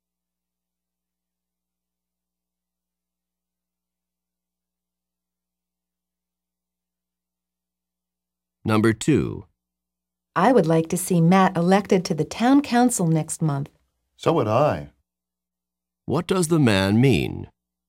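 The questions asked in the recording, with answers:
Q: What does the man mean?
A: He also wants Matt elected to the town council.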